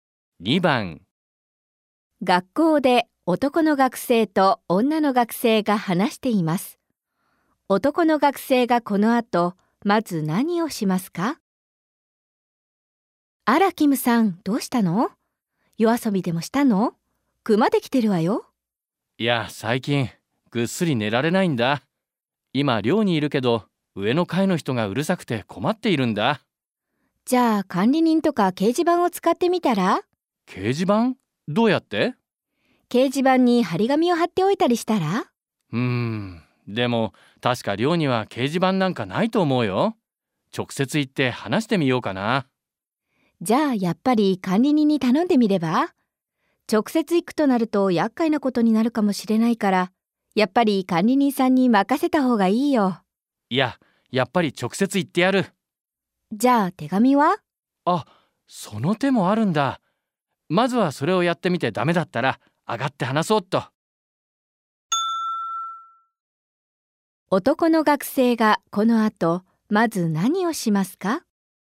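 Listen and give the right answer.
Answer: 上の階の人に手紙を書く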